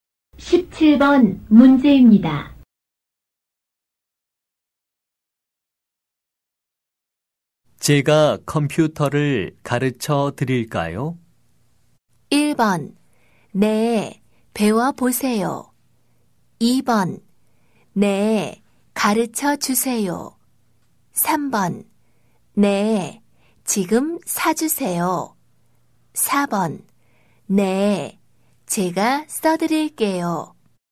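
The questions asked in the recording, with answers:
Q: 제가 컴퓨터를 가르쳐 드릴까요?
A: 2: 네, 가르쳐 주세요.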